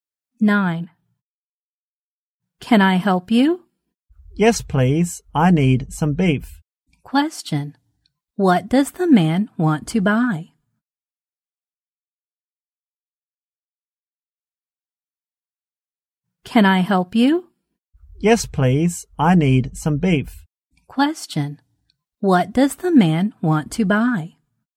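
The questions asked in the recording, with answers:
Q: What does the man want to buy?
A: Some beef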